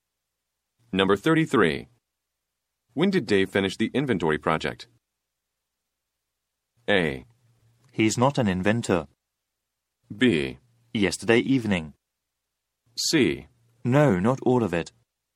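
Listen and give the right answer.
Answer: B: Yesterday evening.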